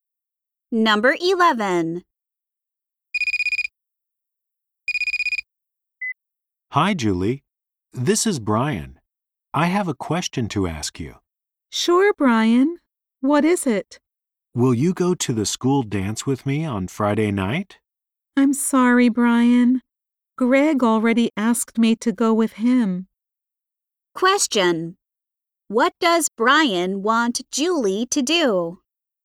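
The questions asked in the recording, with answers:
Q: What does Brian want Julie to do?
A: Go to the school dance with him on Friday night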